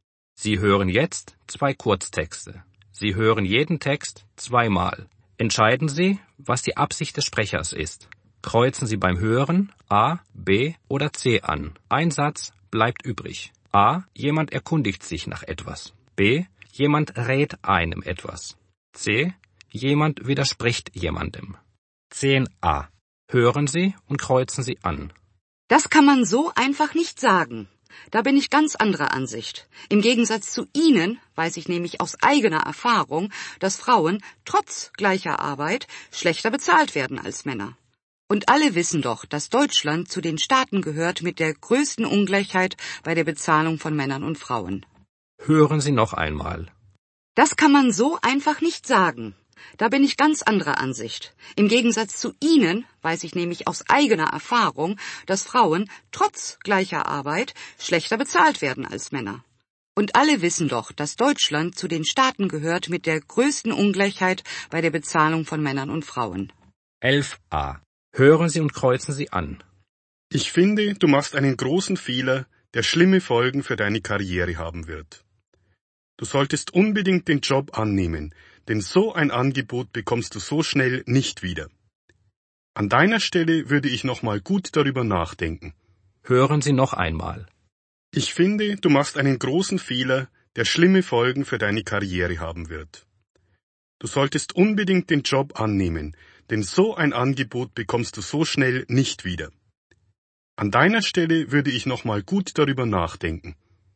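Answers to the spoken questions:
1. C: Jemand widerspricht jemandem.
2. B: Jemand rät einem etwas.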